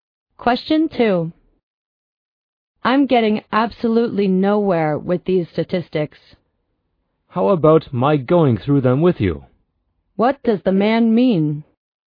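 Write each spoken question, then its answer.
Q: What does the man mean?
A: He offers to help the woman with the statistics.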